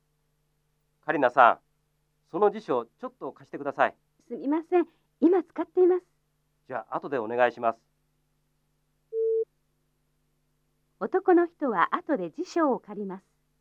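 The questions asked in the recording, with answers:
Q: 男の人は後で辞書を借ります。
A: ○(正しい)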